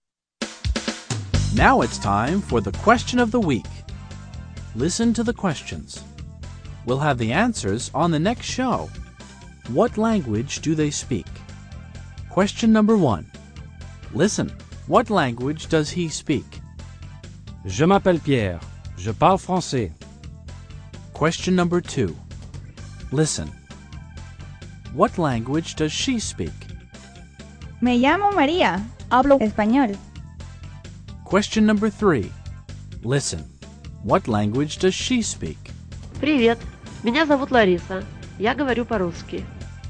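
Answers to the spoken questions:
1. French
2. Spanish
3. Russian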